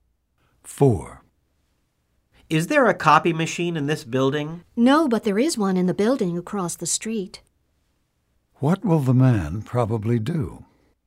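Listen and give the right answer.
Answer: Go to the building across the street to make copies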